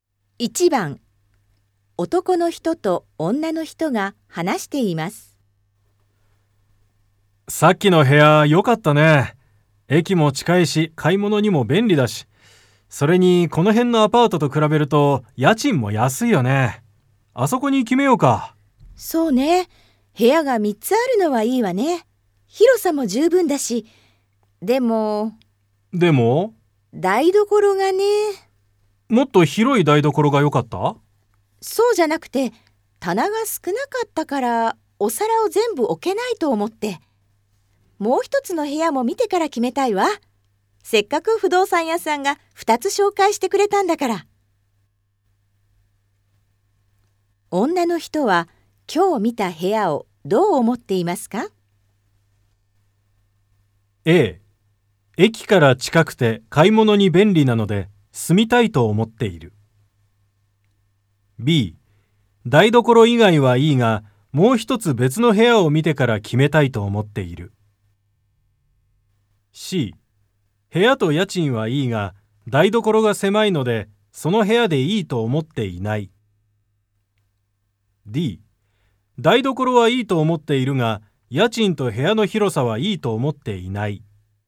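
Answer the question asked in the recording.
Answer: B: 台所以外はいいが、もう一つ別の部屋を見てから決めたいと思っている。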